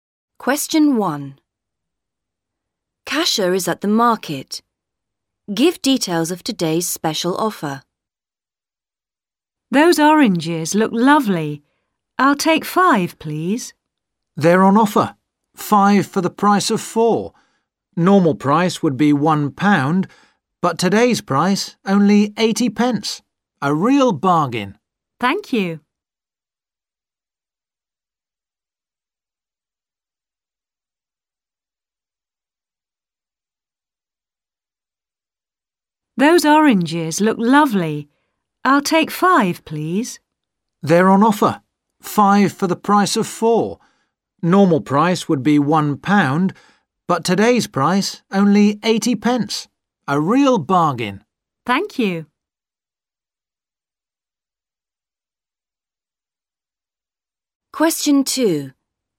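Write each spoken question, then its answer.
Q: Give details of today's special offer.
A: Oranges: 5 for the price of 4 (80 pence instead of £1)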